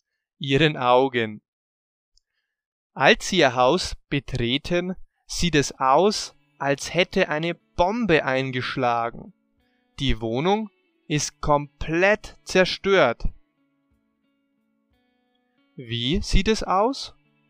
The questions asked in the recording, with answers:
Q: Wie sieht es aus?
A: Als hätte eine Bombe eingeschlagen.